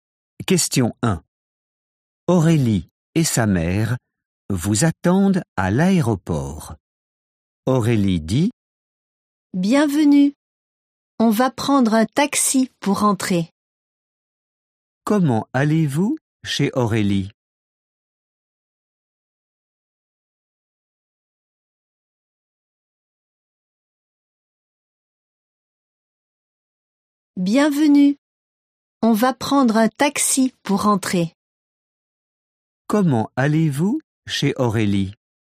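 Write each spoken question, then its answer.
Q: Comment allez-vous chez Aurélie?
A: En taxi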